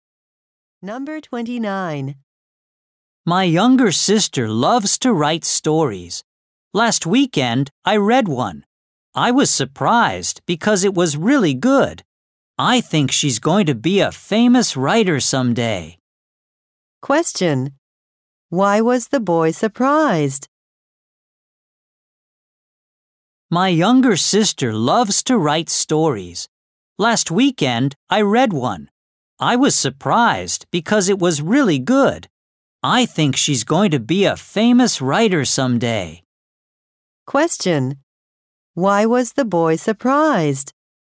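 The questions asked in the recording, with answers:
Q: Why was the boy surprised?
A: His sister's story was really good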